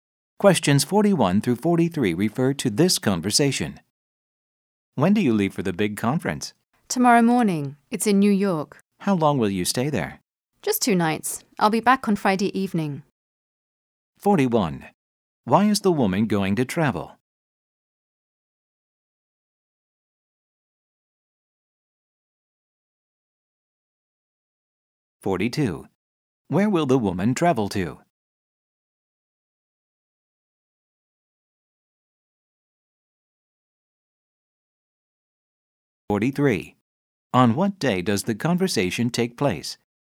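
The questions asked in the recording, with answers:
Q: Why is the woman going to travel?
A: To go to a big conference

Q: Where will the woman travel to?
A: New York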